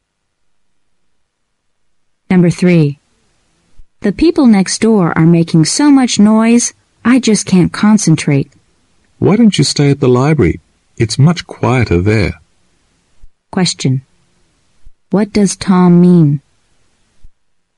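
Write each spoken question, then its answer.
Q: What does Tom mean?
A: The woman should study in the library, where it is quieter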